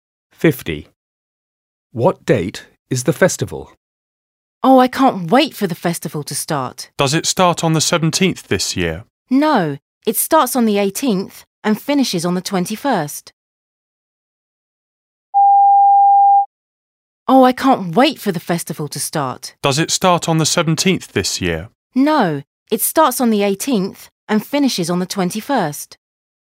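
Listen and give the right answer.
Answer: the 18th to the 21st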